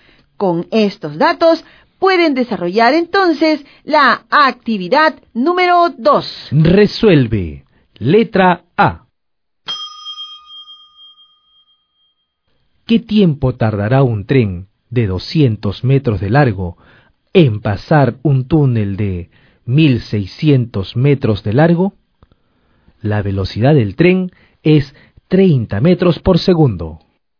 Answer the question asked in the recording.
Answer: Simplificamos adecuadamente y tenemos como resultado 60 segundos, cuyo equivalente es igual a un minuto.